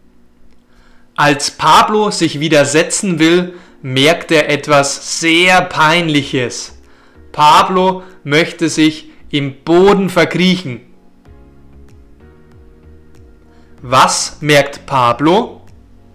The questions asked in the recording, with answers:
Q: Was merkt Pablo?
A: Etwas sehr Peinliches. Pablo merkt etwas sehr Peinliches.